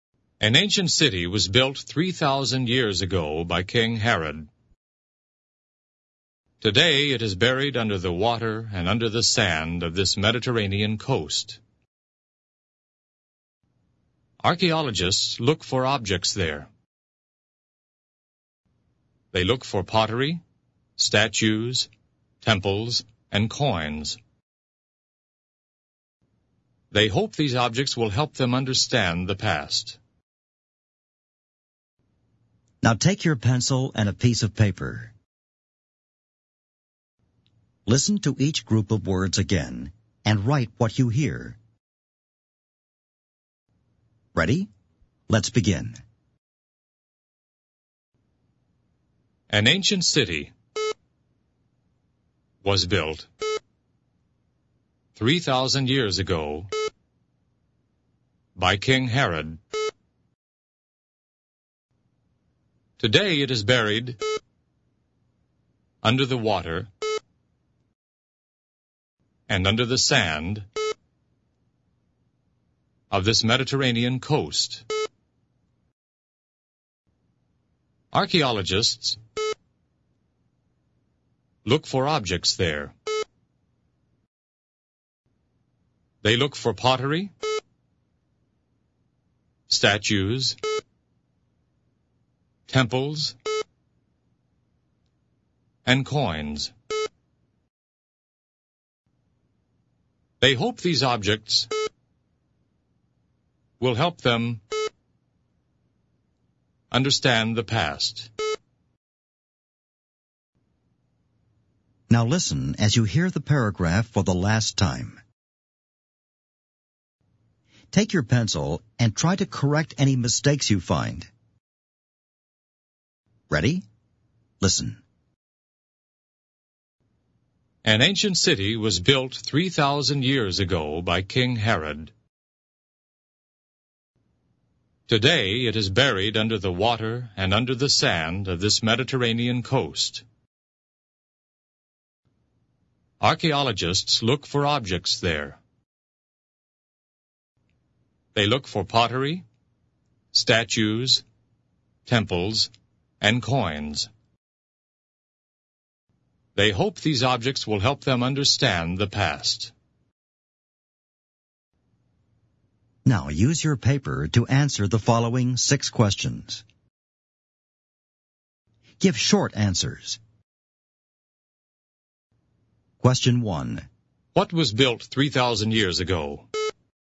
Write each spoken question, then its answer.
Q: What was built 3,000 years ago?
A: An ancient city.